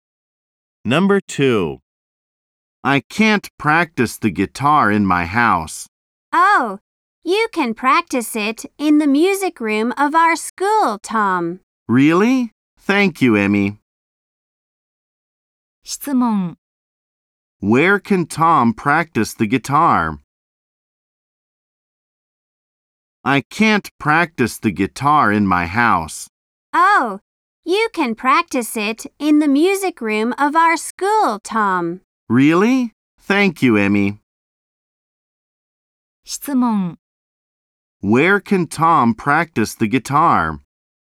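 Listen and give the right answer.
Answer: In the music room of their school.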